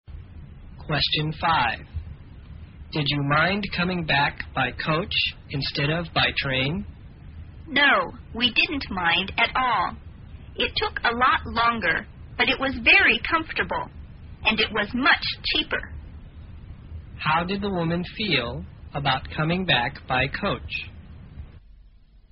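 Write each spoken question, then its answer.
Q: How did the woman feel about coming back by coach?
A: She didn't mind at all; it was comfortable and much cheaper, though slower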